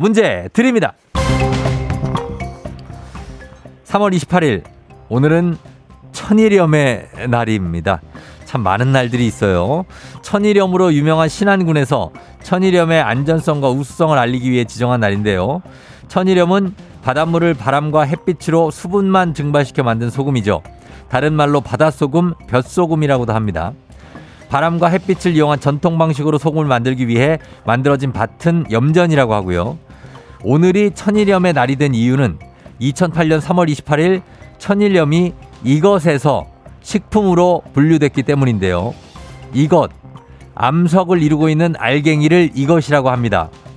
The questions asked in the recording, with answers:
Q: 오늘이 천일염의 날이 된 이유는 2008년 3월 28일 천일염이 이것에서 식품으로 분류됐기 때문인데요.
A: 광물. 광물 정답입니다.